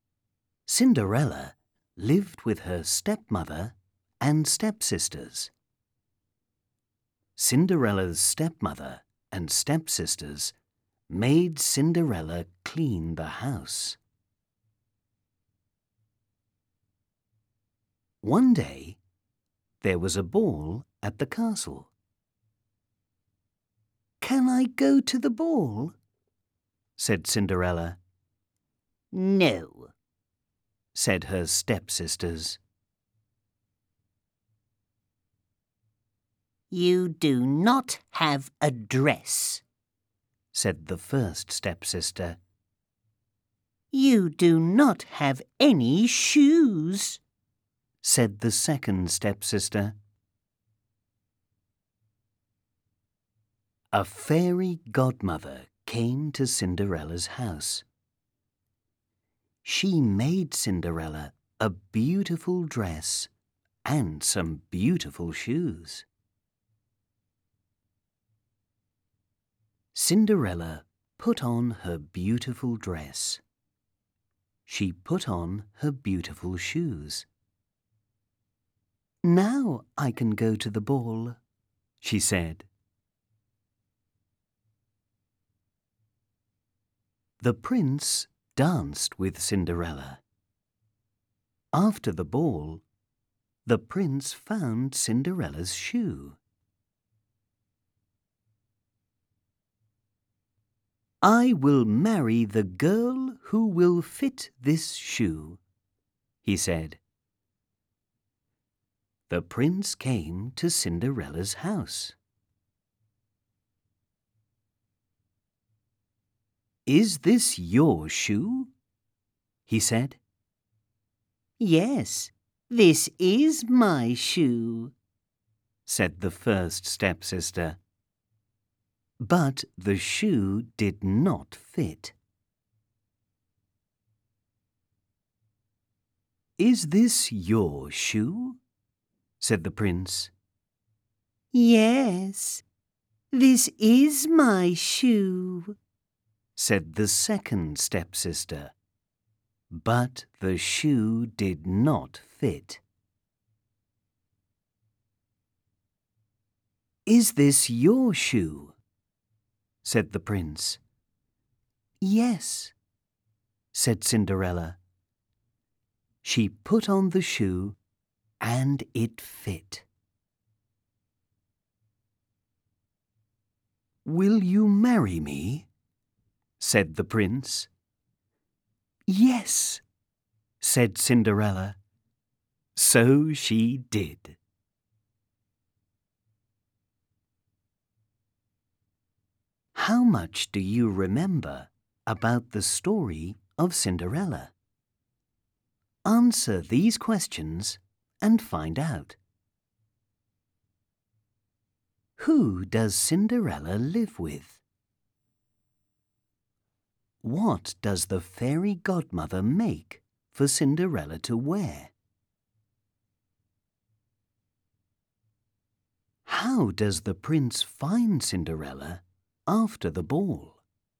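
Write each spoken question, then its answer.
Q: Who does Cinderella live with?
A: Her stepmother and stepsisters

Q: What does the fairy godmother make for Cinderella to wear?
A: A beautiful dress and some beautiful shoes

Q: How does the prince find Cinderella after the ball?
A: He finds her shoe and tries it on girls until it fits Cinderella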